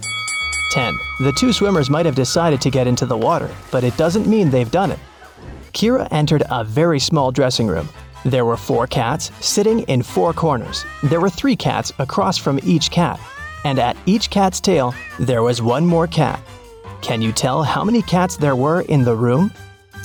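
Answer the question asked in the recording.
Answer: Four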